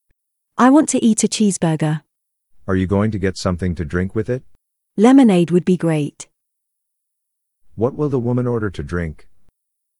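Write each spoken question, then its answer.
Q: What will the woman order to drink?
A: Lemonade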